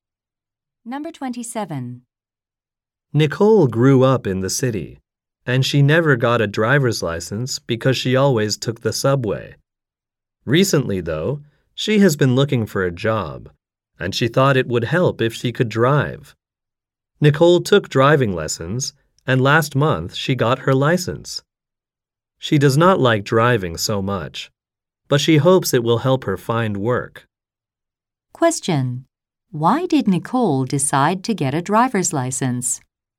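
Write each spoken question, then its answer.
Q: Why did Nicole decide to get a driver's license?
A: She thought it would help her find a job.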